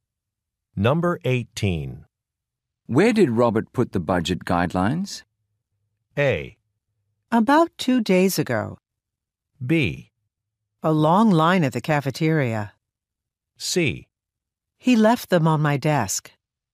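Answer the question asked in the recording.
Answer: C: He left them on my desk.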